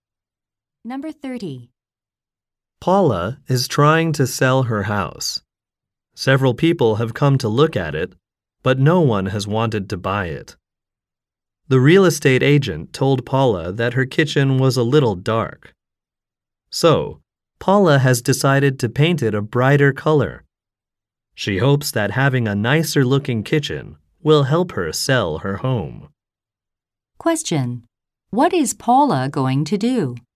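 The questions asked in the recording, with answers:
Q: What is Paula going to do?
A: Paint her kitchen a brighter color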